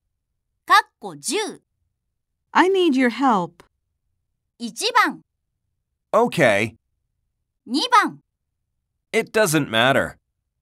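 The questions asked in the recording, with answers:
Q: I need your help.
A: 1: Okay.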